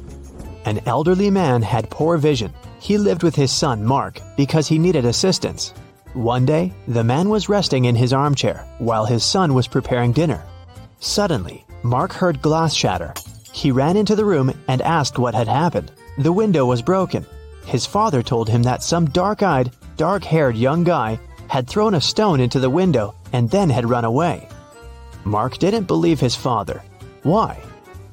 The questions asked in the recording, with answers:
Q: Mark didn't believe his father why?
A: The man had poor vision. He couldn't see the boy, and of course, he couldn't figure out the color of his hair and eyes.